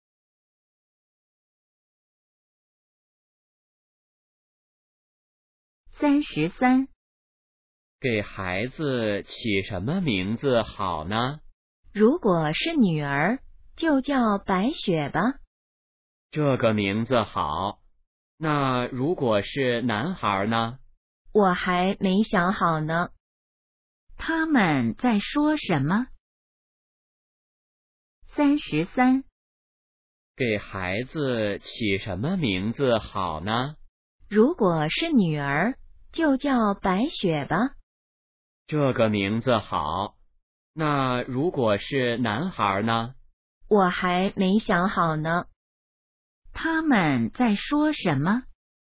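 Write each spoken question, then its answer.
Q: 他们在说什么?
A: 给孩子起名字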